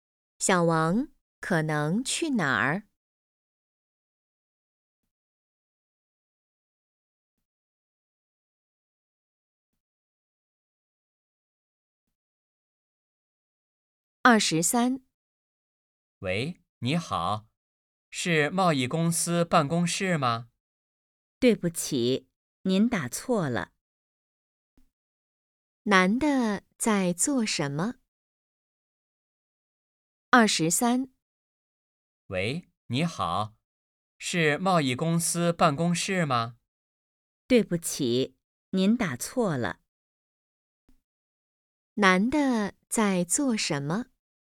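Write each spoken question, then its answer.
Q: 男的在做什么?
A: 打电话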